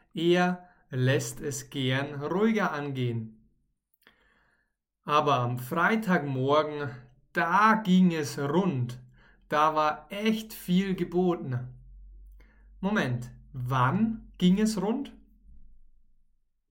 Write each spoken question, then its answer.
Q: Moment, wann ging es rund?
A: Am Freitagmorgen. Am Freitagmorgen ging es rund.